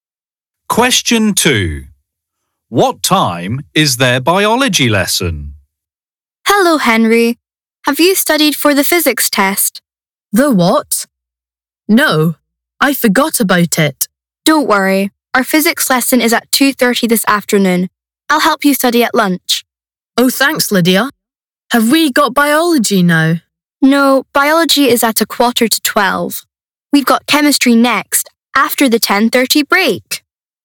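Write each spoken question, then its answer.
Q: What time is their biology lesson?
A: 11:45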